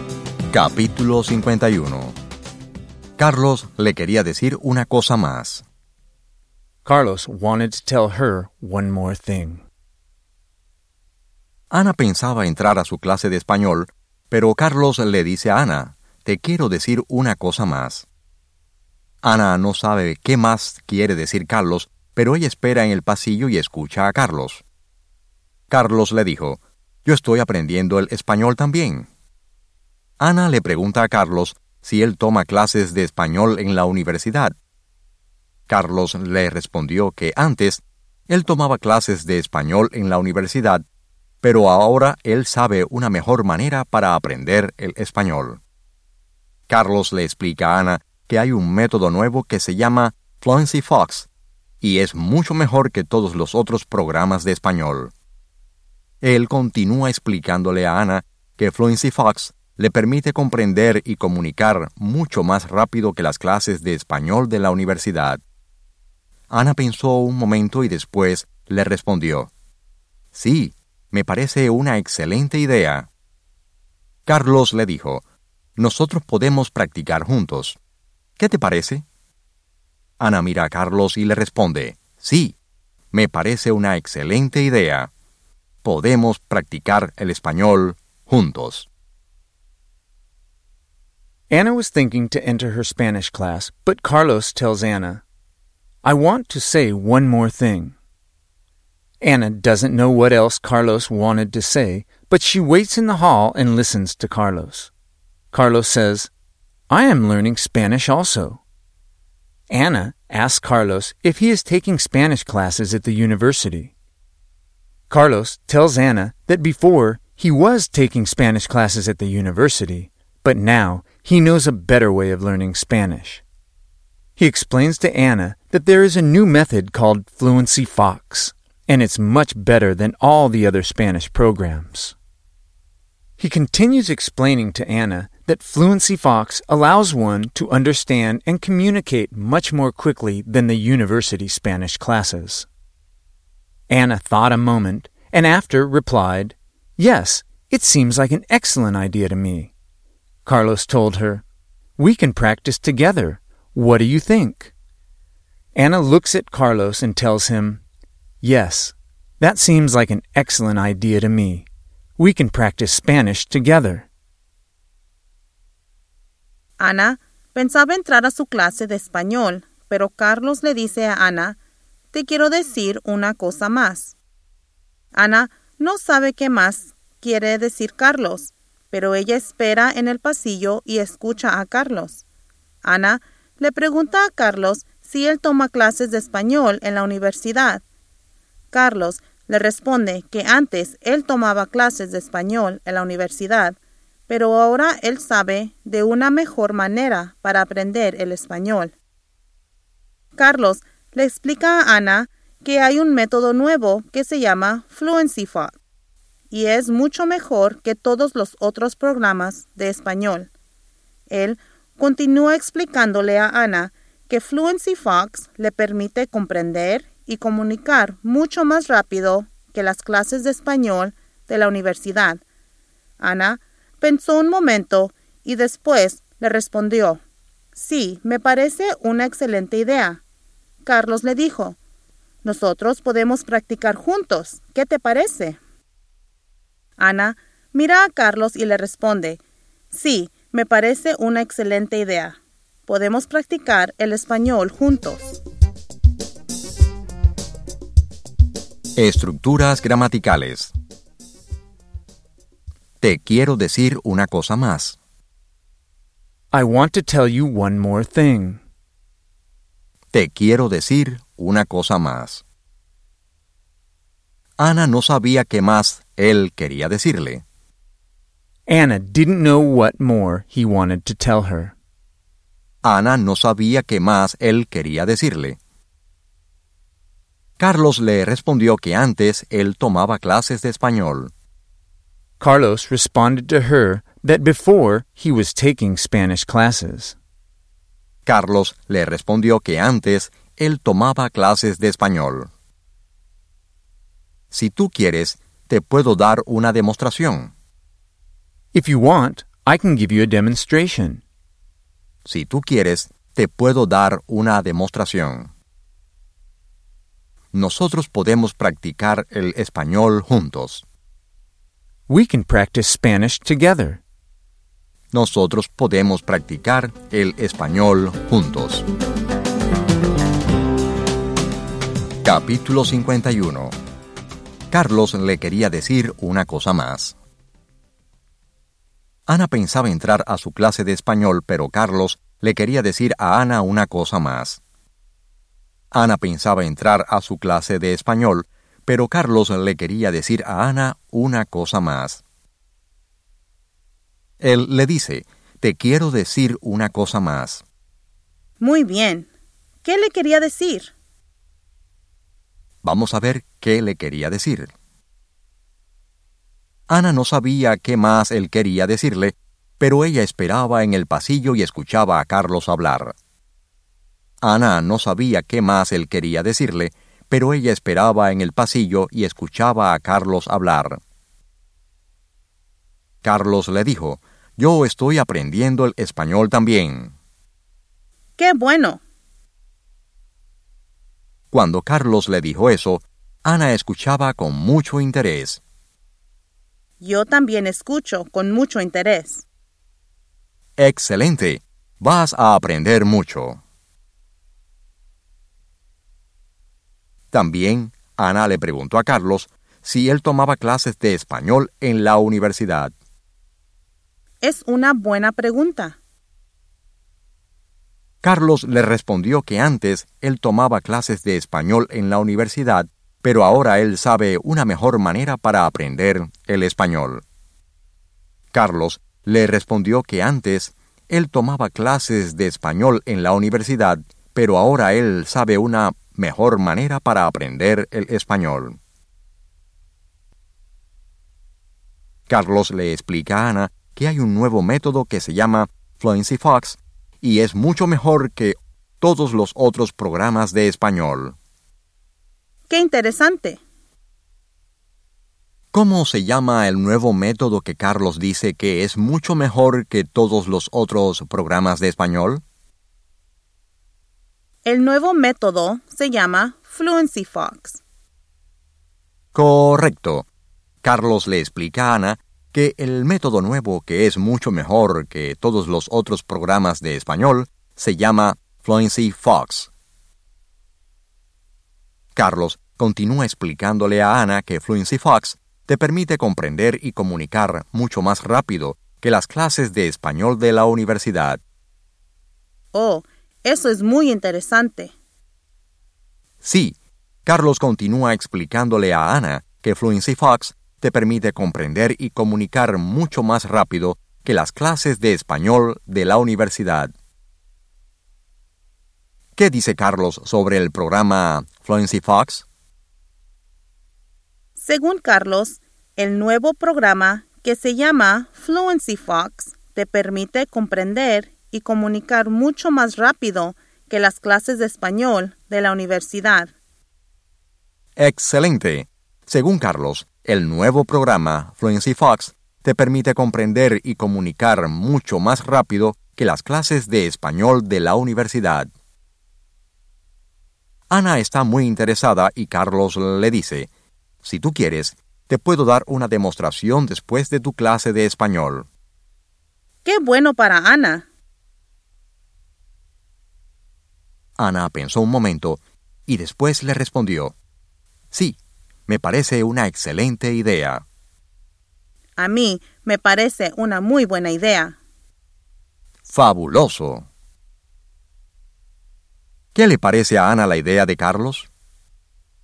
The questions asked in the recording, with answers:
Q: ¿Cómo se llama el nuevo método que Carlos dice que es mucho mejor que todos los otros programas de español?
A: El nuevo método se llama Fluency Fox.

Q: ¿Qué dice Carlos sobre el programa Fluency Fox?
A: Según Carlos, el nuevo programa que se llama Fluency Fox te permite comprender y comunicar mucho más rápido que las clases de español de la universidad.

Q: ¿Qué le parece a Ana la idea de Carlos?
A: Le parece una excelente idea.